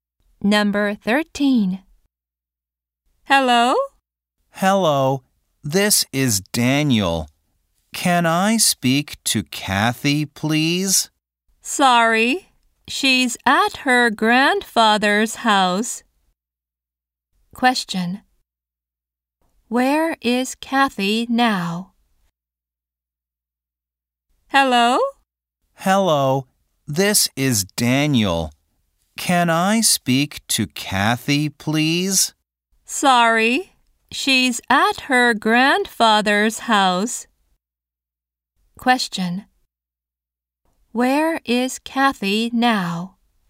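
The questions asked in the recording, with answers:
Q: Where is Kathy now?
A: At her grandfather's house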